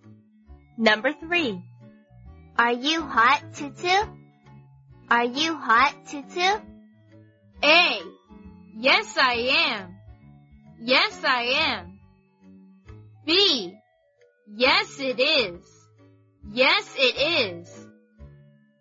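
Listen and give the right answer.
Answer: A: Yes, I am.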